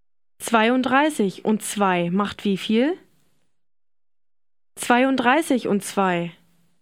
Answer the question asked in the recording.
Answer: 34.